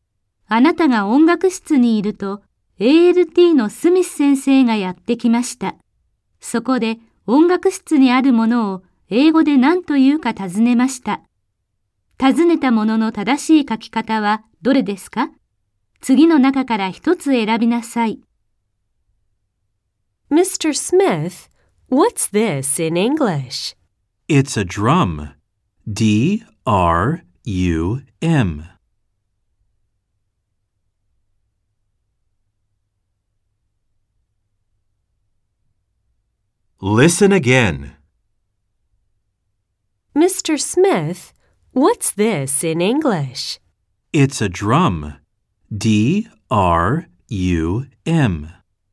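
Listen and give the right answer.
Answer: drum (D-R-U-M)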